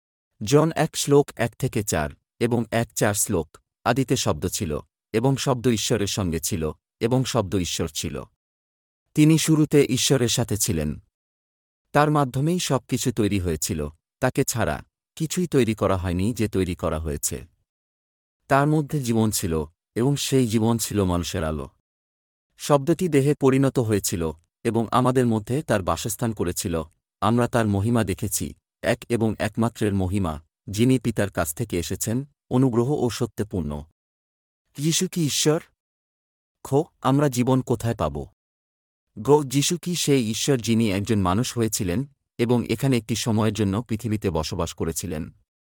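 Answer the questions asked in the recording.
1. হ্যাঁ
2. যীশুর (শব্দের) মধ্যে
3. হ্যাঁ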